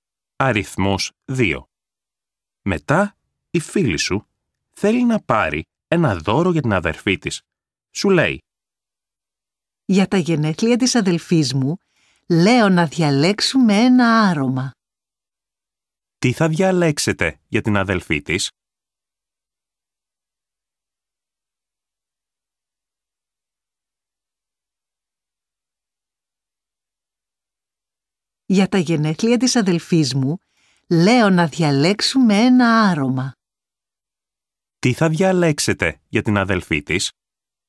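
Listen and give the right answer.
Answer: ένα άρωμα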